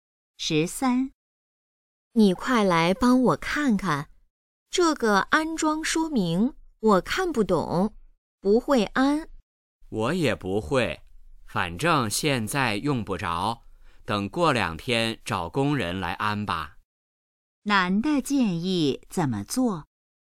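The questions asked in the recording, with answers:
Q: 男的建议怎么做?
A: 过两天找工人来安装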